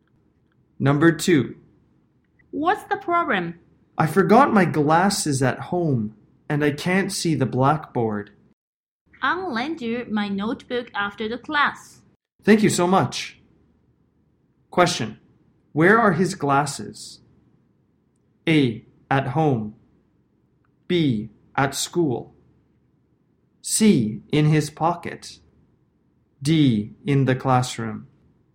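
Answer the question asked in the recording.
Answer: A: At home.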